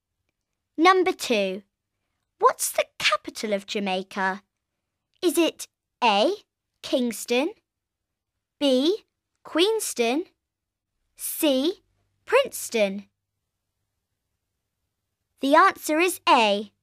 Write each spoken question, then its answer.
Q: What's the capital of Jamaica?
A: The answer is A. It's Kingston.